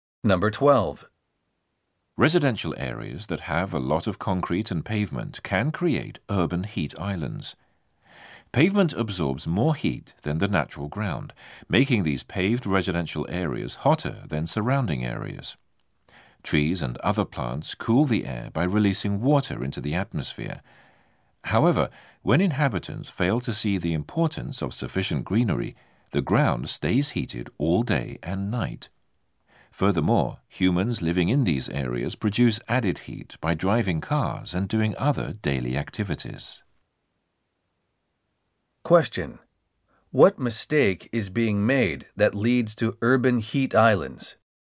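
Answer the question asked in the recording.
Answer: Inhabitants don't see the importance of having enough greenery, so there aren't enough trees and plants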